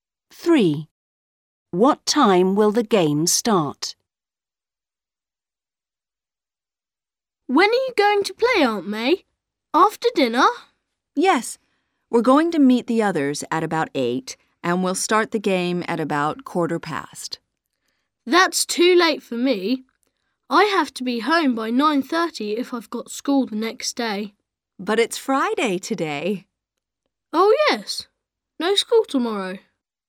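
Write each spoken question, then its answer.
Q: What time will the game start?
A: at about 8:15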